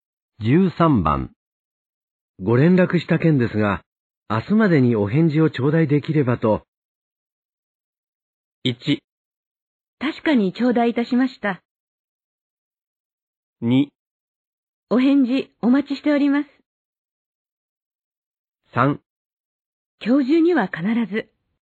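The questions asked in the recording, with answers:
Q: ご連絡した件ですが、明日までにお返事を頂戴できればと。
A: 3: 今日中には必ず。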